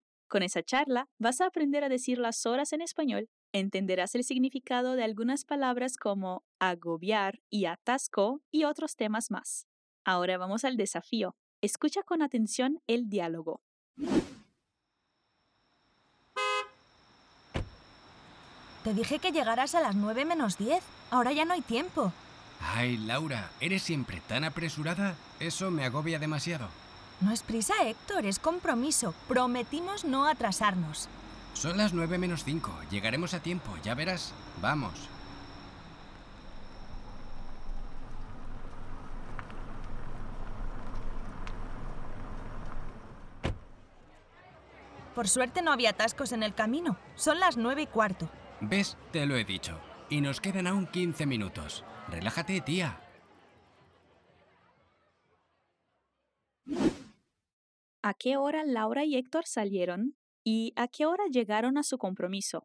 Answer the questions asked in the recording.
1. Héctor dice, son las 9 menos 5.
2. Son las 9 y cuarto.